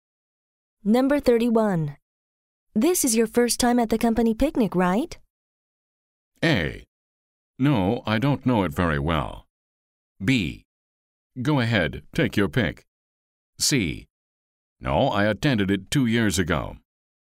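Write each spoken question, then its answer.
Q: This is your first time at the company picnic, right?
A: C: No, I attended it 2 years ago.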